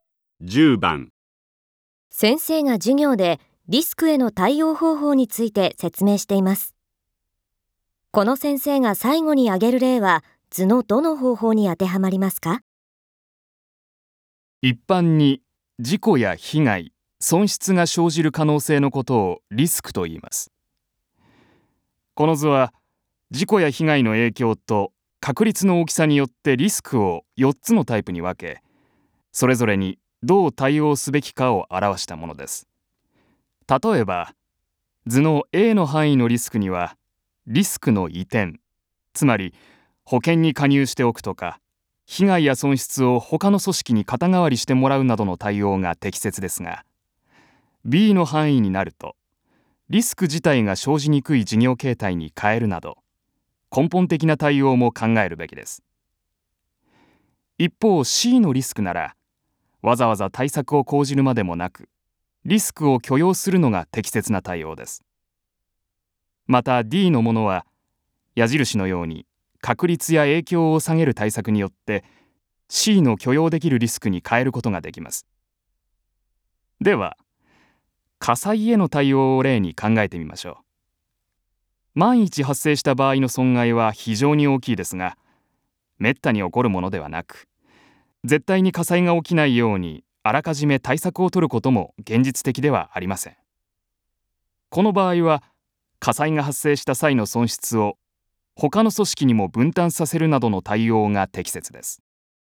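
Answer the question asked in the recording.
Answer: A: リスクの移転(保険に加入する、損失を他の組織に肩代わりしてもらう)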